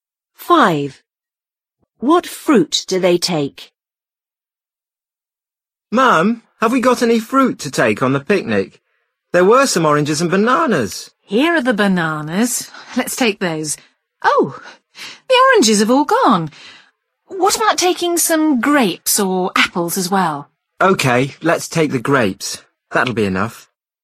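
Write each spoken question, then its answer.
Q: What fruit do they take?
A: Bananas and grapes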